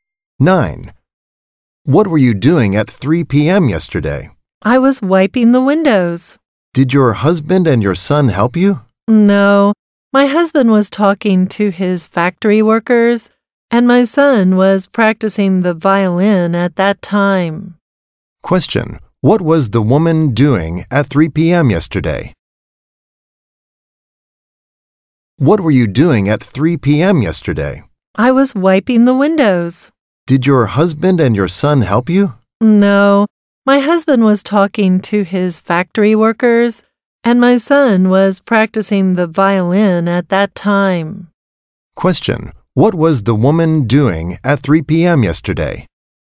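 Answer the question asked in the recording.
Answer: Wiping the windows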